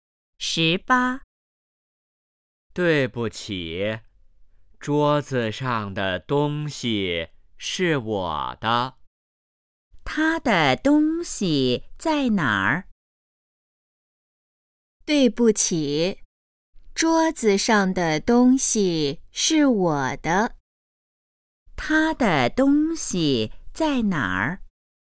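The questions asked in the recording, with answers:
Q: 他的东西在哪儿?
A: 桌子上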